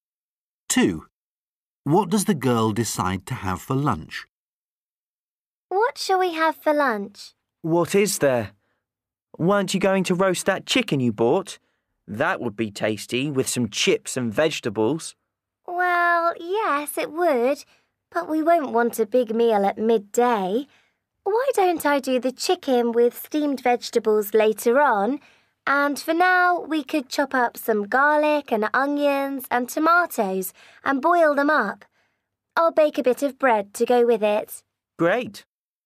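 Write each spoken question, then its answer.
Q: What does the girl decide to have for lunch?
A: Boiled garlic, onion and tomato (soup) with bread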